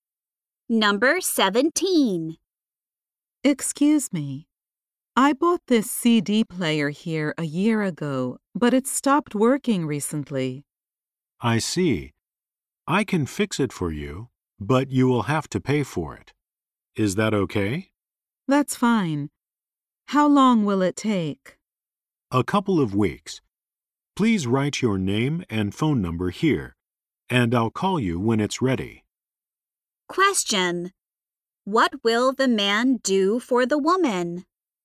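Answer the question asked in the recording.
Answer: Fix her CD player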